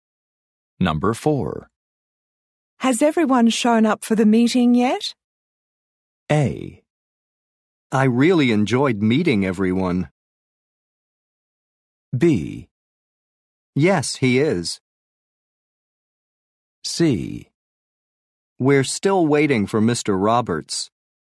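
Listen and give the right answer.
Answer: C: We're still waiting for Mr. Roberts.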